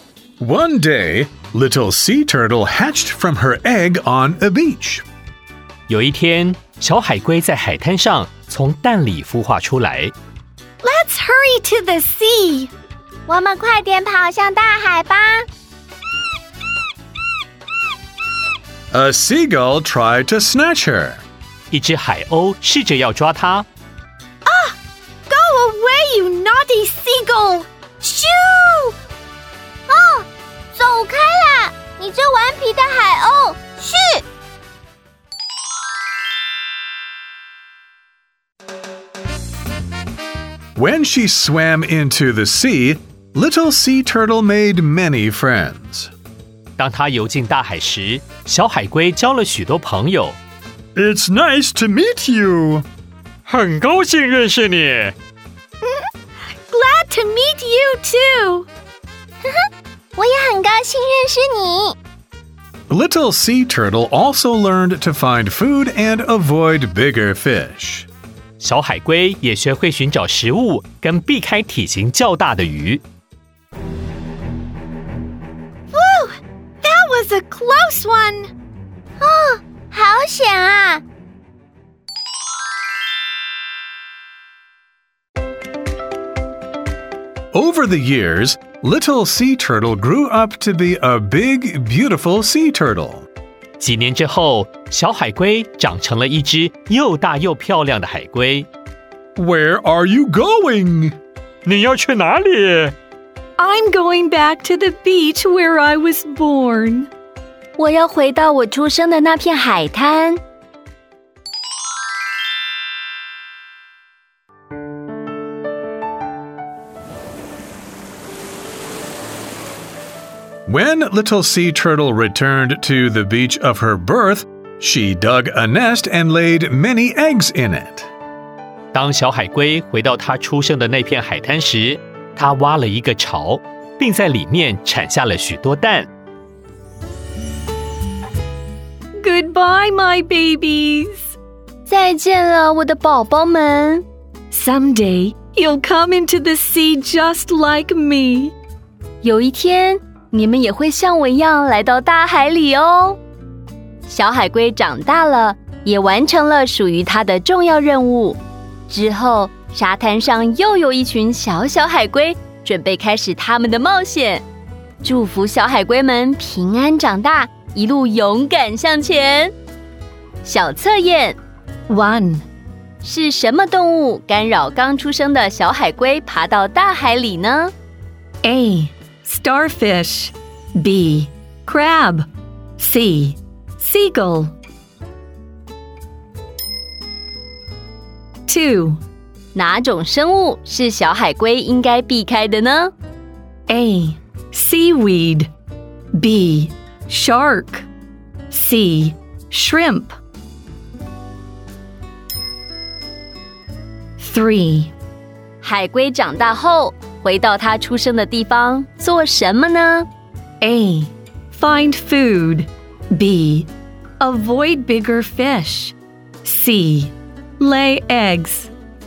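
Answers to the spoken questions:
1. C: Seagull
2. B: Shark
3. C: Lay eggs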